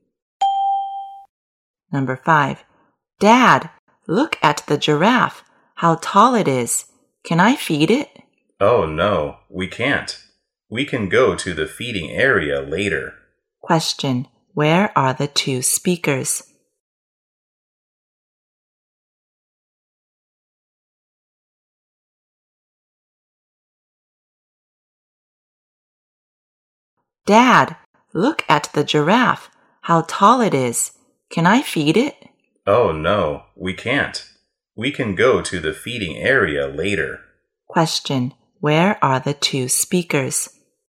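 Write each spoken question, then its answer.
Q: where are the two speakers?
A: At the zoo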